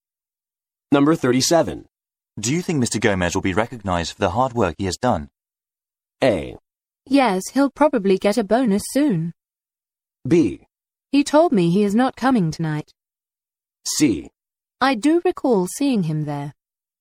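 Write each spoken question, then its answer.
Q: Do you think Mr. Gomez will be recognized for the hard work he has done?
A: A: Yes, he'll probably get a bonus soon.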